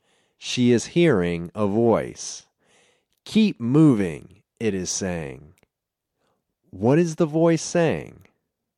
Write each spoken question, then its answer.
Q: What is the voice saying?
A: The voice is saying, keep moving.